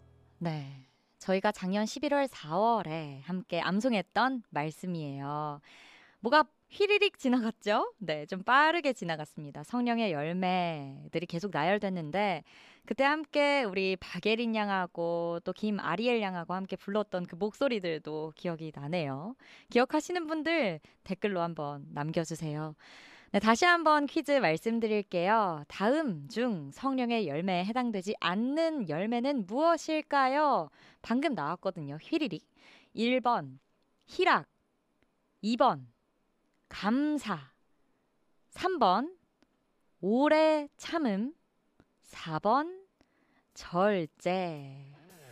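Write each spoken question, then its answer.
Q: 다음 중 성령의 열매에 해당되지 않는 열매는 무엇일까요?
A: 2번: 감사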